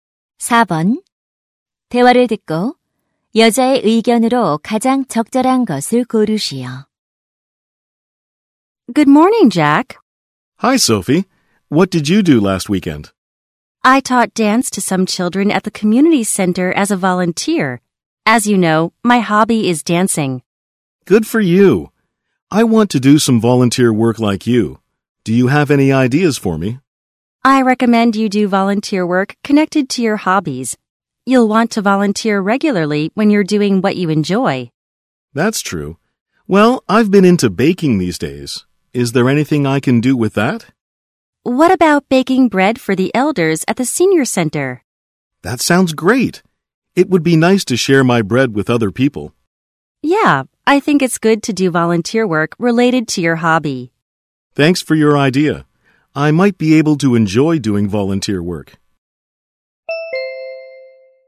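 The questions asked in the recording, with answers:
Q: 대화를 듣고 여자의 의견으로 가장 적절한 것을 고르시오.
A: 취미와 관련된 봉사활동을 하는 것이 좋다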